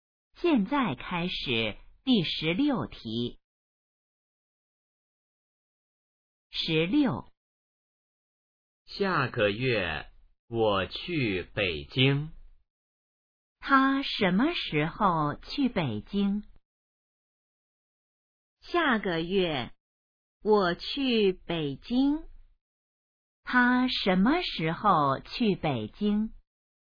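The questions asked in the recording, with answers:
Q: 他什么时候去北京?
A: 下个月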